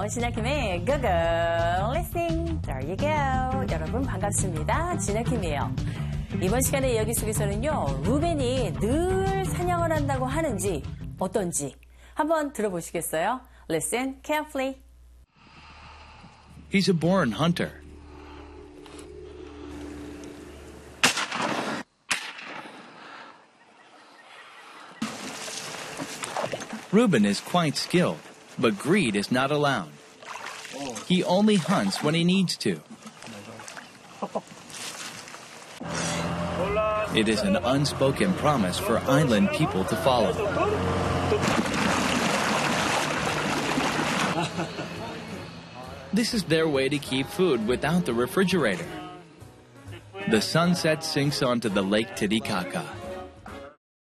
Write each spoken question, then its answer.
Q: 루벤이 늘 사냥을 한다고 하는지 어떤지 한번 들어보시겠어요?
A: He hunts when he needs to.